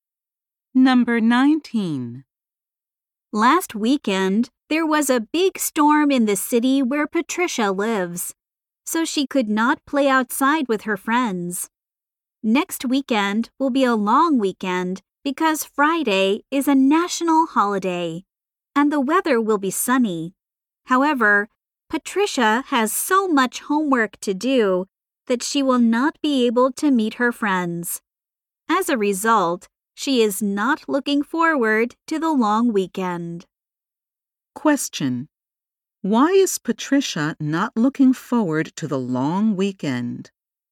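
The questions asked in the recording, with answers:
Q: Why is Patricia not looking forward to the long weekend?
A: She has a lot of homework to do.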